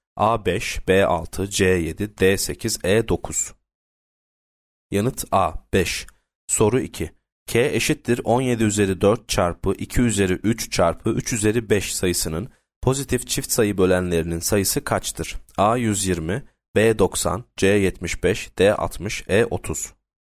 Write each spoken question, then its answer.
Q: K eşittir 17 üzeri 4 çarpı 2 üzeri 3 çarpı 3 üzeri 5 sayısının pozitif çift sayı bölenlerinin sayısı kaçtır?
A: Yanıt B 90.